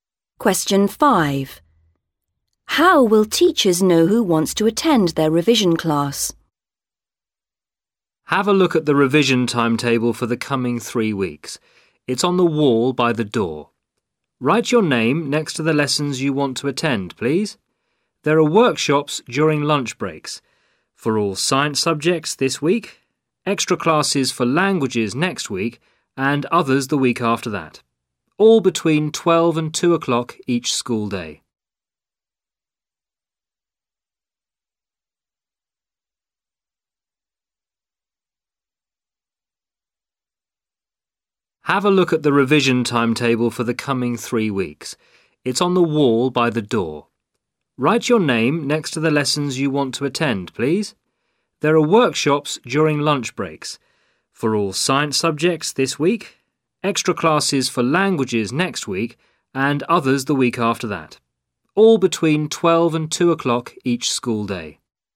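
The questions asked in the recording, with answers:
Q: How will teachers know who wants to attend their revision class?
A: Students write their names on the timetable next to the lessons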